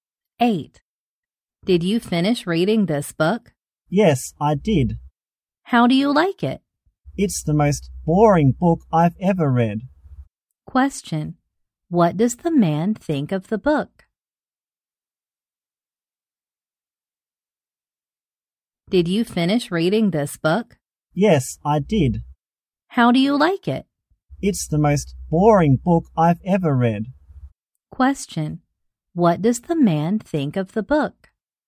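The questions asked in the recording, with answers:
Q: What does the man think of the book?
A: It's the most boring book he's ever read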